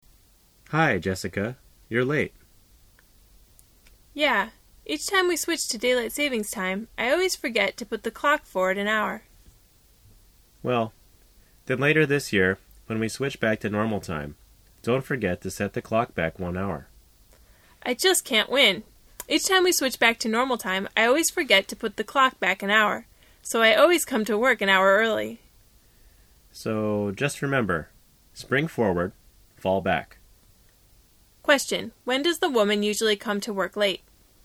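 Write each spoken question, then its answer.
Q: Question, when does the woman usually come to work late?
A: When they switch to daylight saving time (in spring), because she forgets to put the clock forward an hour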